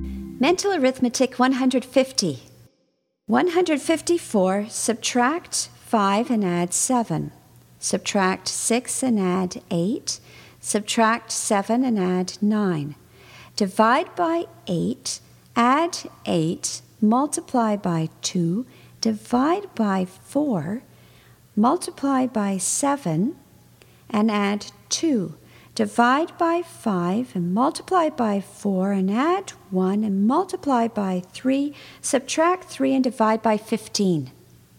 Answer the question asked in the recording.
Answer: And the answer is 16.